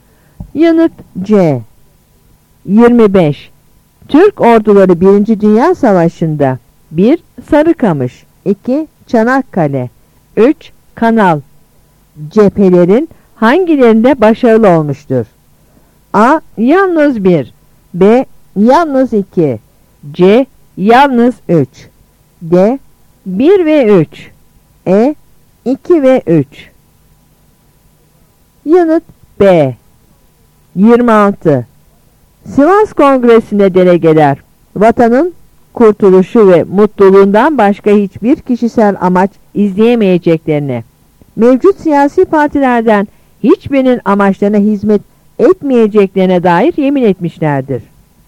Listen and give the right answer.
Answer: Yanıt B.